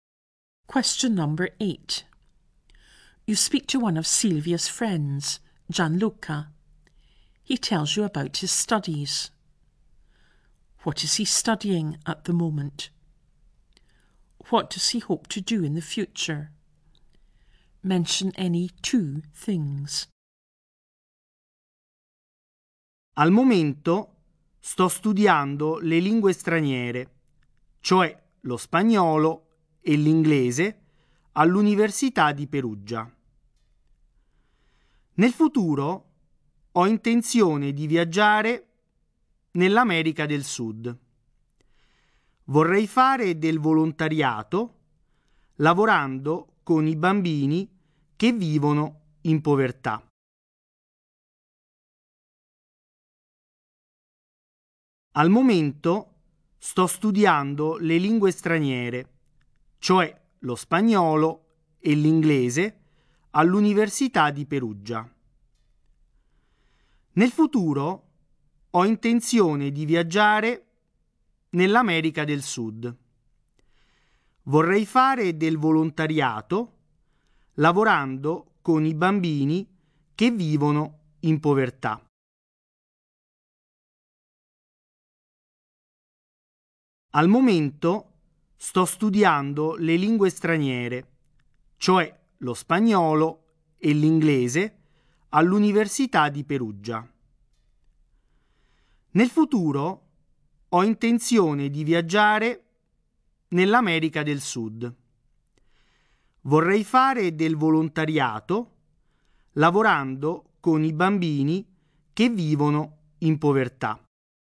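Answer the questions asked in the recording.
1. Foreign languages, Spanish and English, at Perugia University
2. Travel in South America; do voluntary work with children living in poverty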